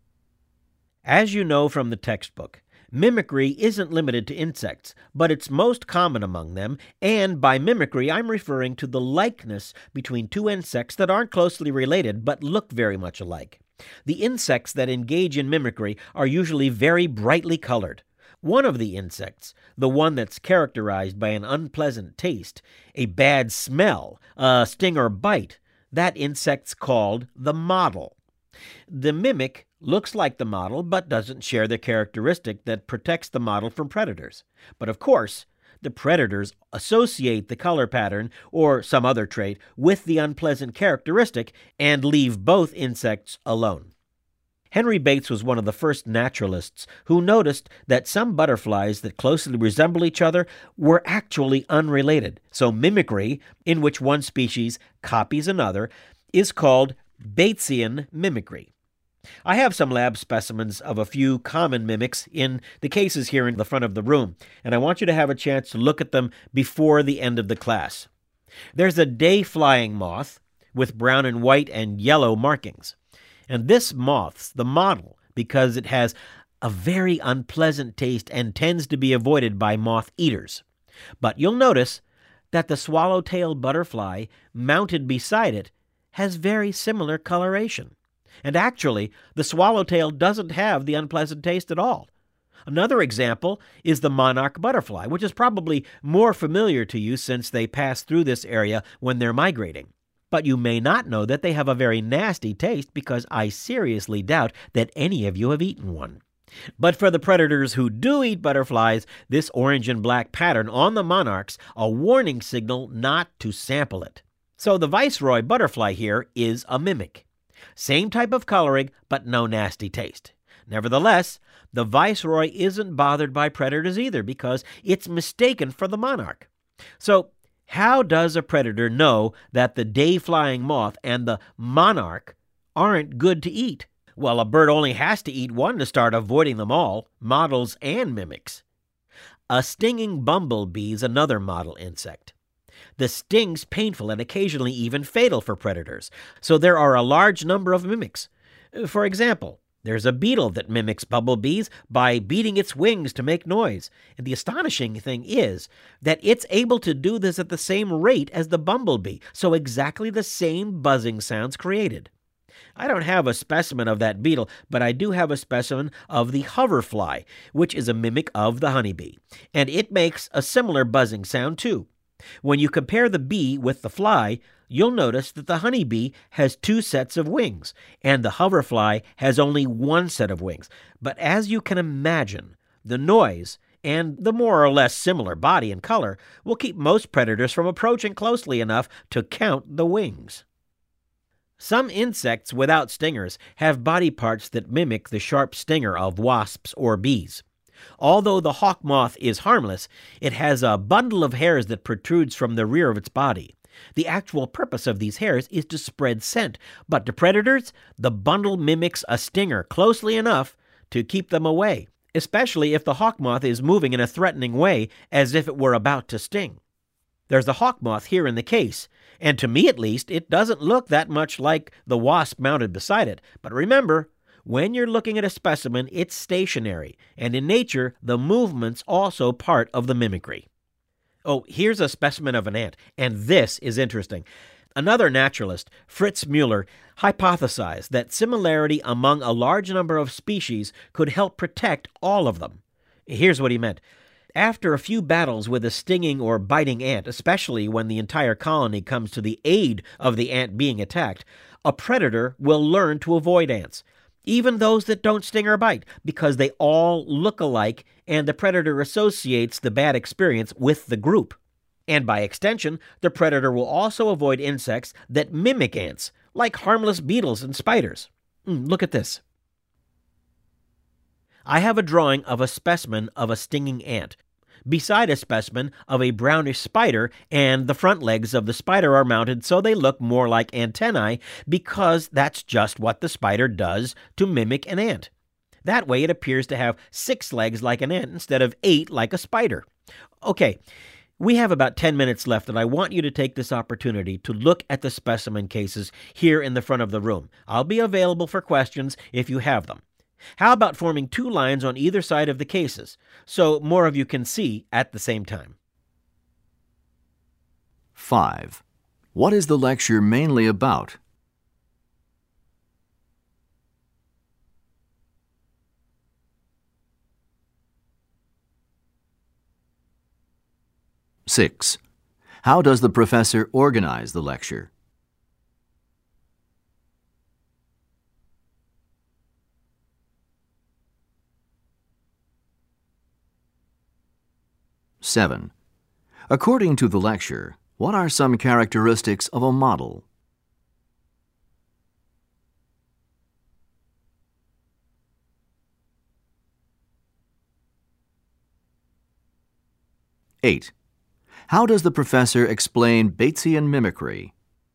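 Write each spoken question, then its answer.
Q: What is the lecture mainly about?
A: Mimicry among insects (models and mimics)

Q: According to the lecture, what are some characteristics of a model?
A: An unpleasant taste, a bad smell, or a sting or bite; often brightly colored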